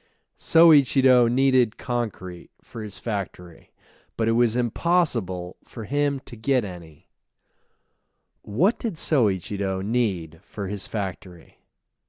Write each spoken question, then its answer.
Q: What did Soichiro need for his factory?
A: He needed concrete for his factory.